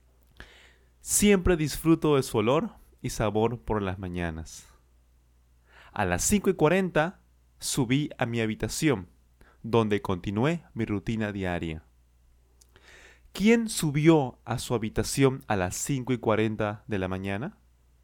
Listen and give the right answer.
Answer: Ángel, por supuesto, Ángel.